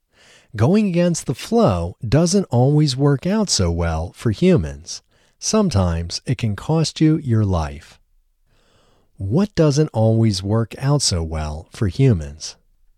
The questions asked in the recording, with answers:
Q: What doesn't always work out so well for humans?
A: Going against the flow doesn't always work out so well for humans.